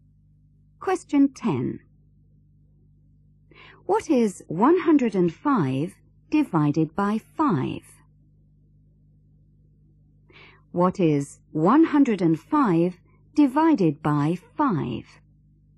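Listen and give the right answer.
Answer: 21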